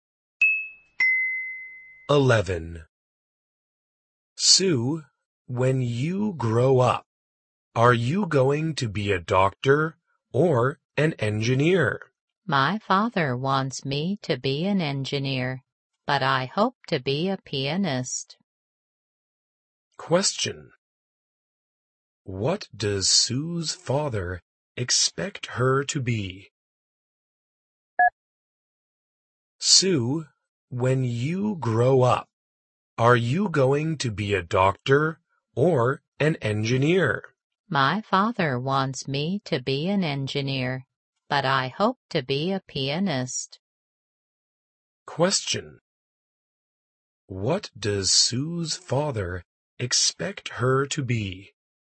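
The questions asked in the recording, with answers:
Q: What does Sue's father expect her to be?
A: An engineer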